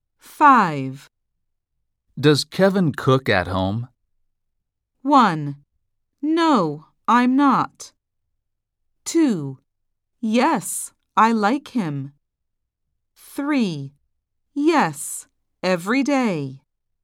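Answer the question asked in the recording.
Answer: 3: Yes, every day.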